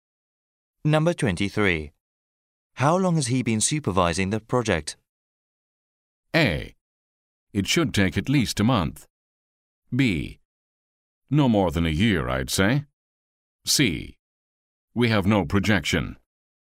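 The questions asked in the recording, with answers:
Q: How long has he been supervising the project?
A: B: No more than a year, I'd say.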